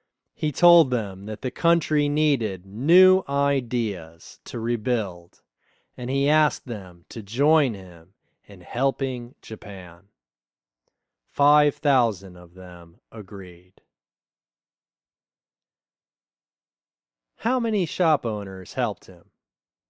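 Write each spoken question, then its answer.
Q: How many shop owners helped him?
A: 5,000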